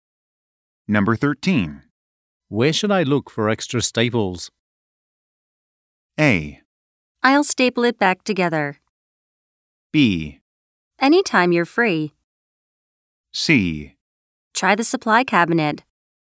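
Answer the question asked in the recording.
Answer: C: Try the supply cabinet.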